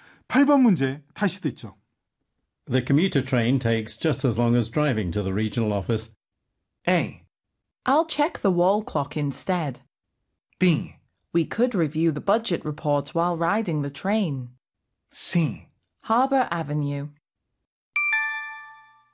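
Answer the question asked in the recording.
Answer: B: We could review the budget report while riding the train.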